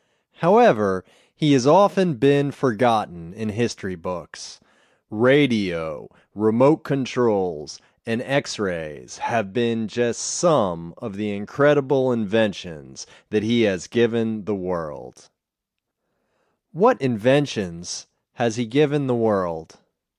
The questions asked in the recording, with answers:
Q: What inventions has he given the world?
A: He has given the world radio, remote controls, and X-rays.